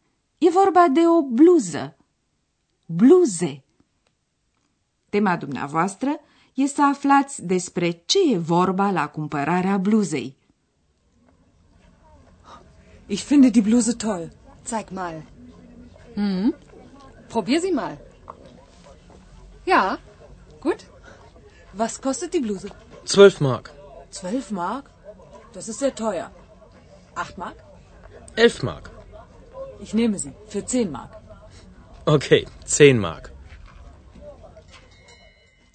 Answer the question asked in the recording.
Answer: E o scenă tipică de talcioc.